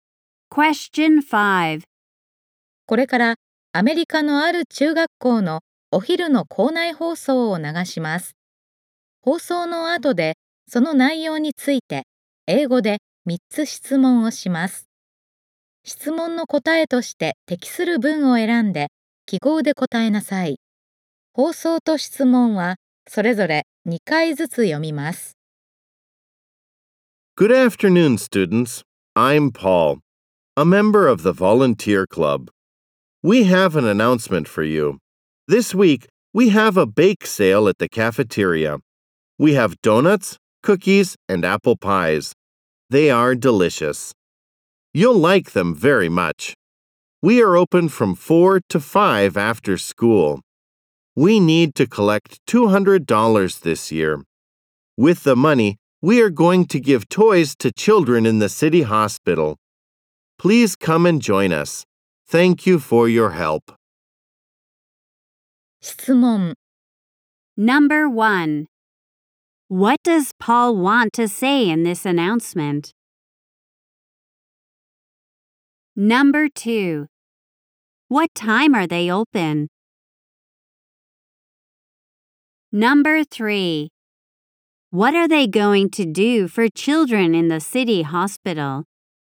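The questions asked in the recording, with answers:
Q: What time are they open?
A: From 4 to 5 after school.

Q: What are they going to do for children in the city hospital?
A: They are going to give them toys.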